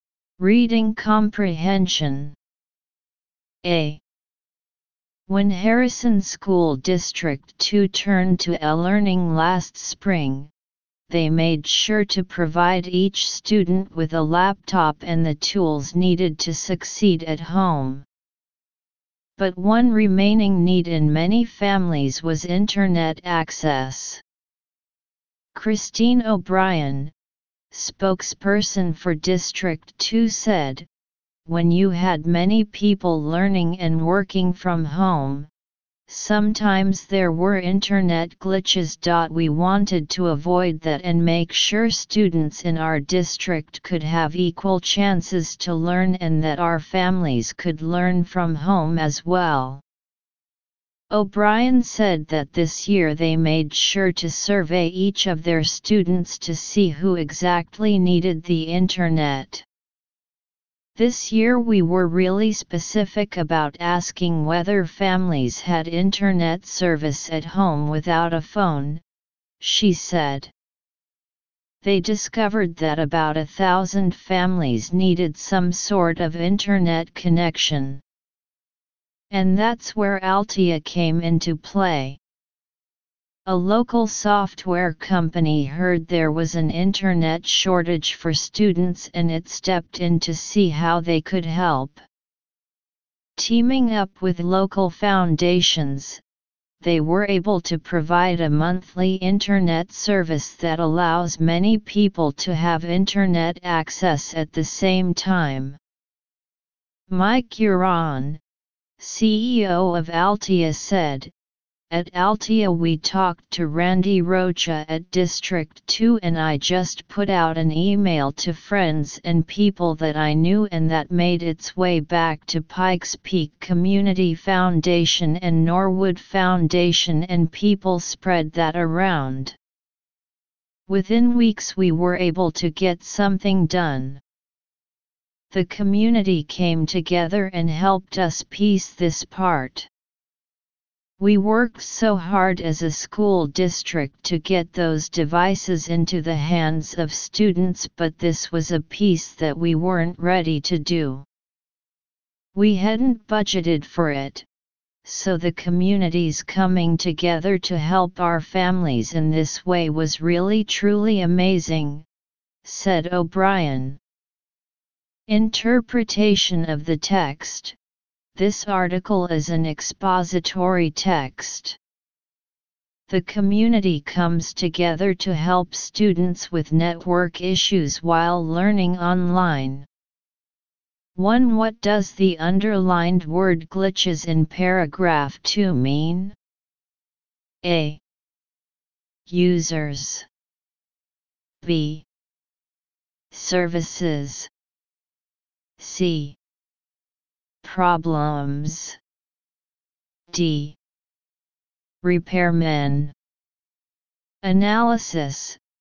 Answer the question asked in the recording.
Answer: Choose C